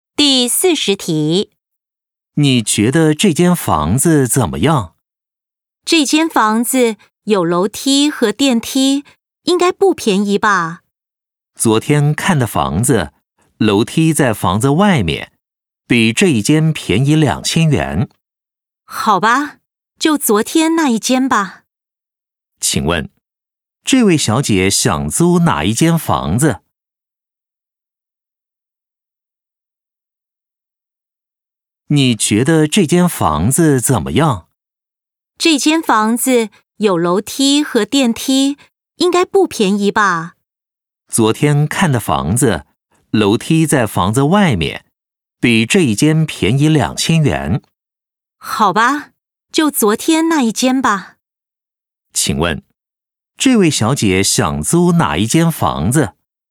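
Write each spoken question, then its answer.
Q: 请问,这位小姐想租哪一间房子?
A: 昨天看的那一间(楼梯在外面、便宜2000元)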